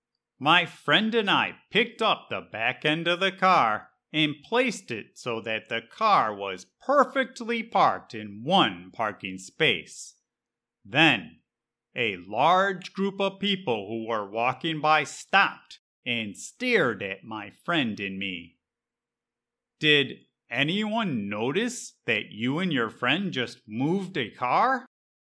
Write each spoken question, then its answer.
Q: Did anyone notice that you and your friend just moved a car?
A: Yes, there was a large group of people that saw us and were staring at us.